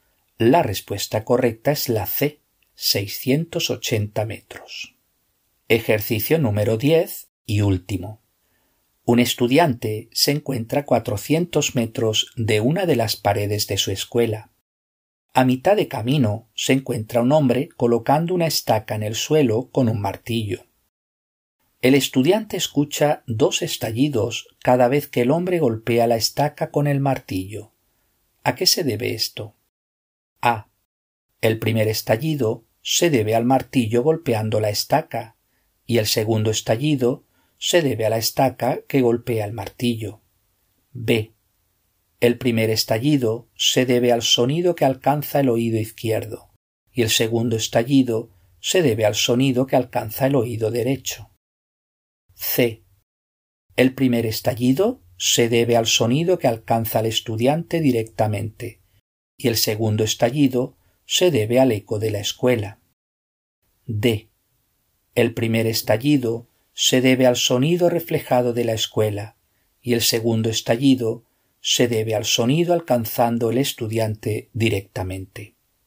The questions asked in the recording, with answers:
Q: ¿A qué se debe esto?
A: La respuesta correcta es la C.